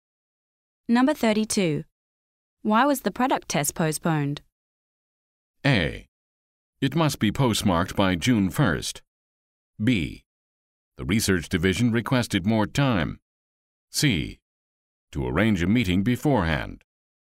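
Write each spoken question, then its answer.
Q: Why was the product test postponed?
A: B: The research division requested more time.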